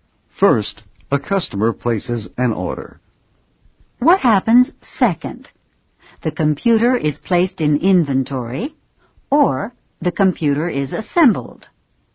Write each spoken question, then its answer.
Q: What happens second?The computer is placed in inventory, or the computer is assembled.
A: Second, the computer is assembled.